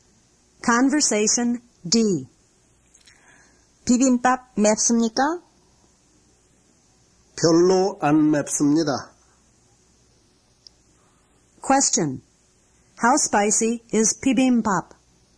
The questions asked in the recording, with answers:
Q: How spicy is bibimbap?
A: It's not really spicy.